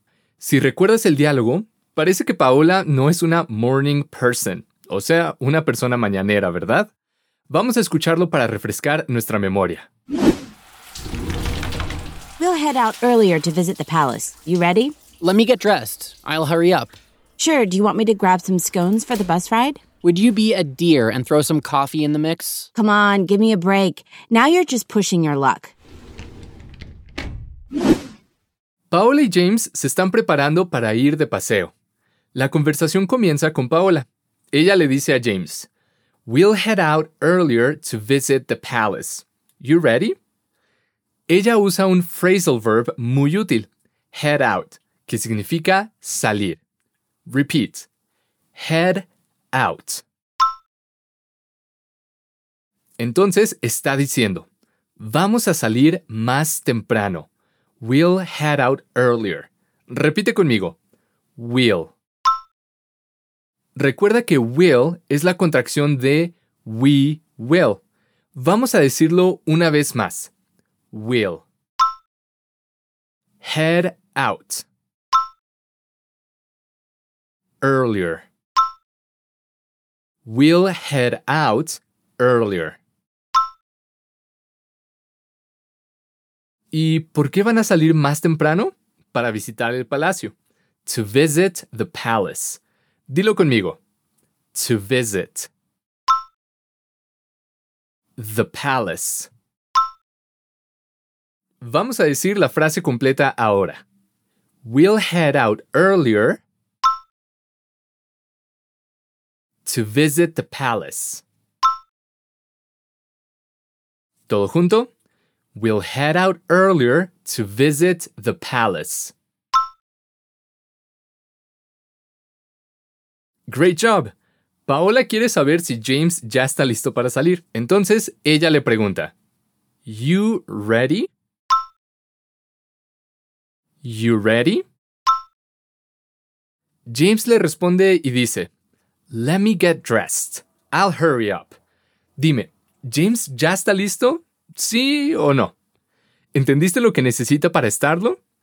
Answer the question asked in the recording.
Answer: Le falta ponerse la ropa.